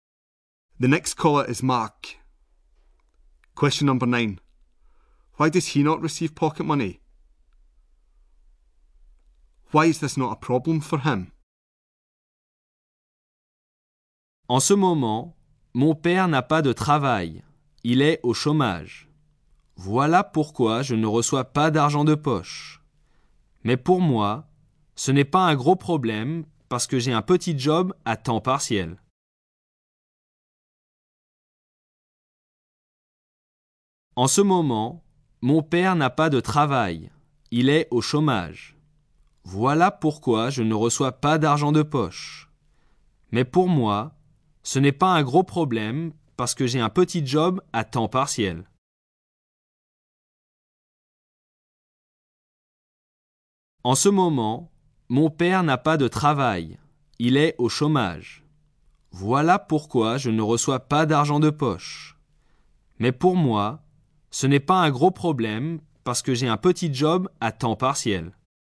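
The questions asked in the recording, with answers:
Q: Why does he not receive pocket money?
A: His father is unemployed

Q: Why is this not a problem for him?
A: He has a part-time job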